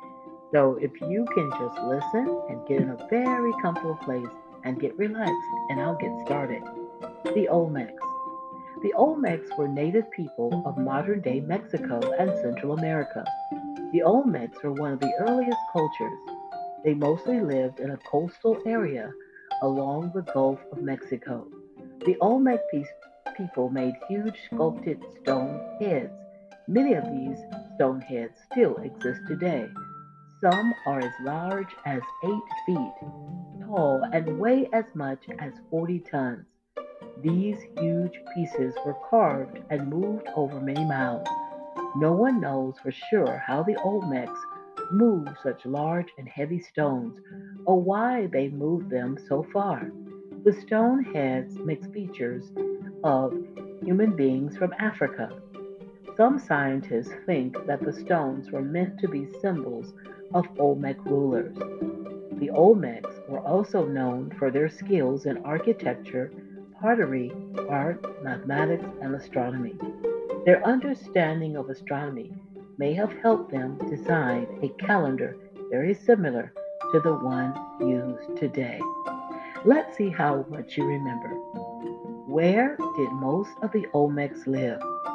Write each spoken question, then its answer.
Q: Where did most of the Olmecs live?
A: If you said a coastal area along the Gulf of Mexico, you were right.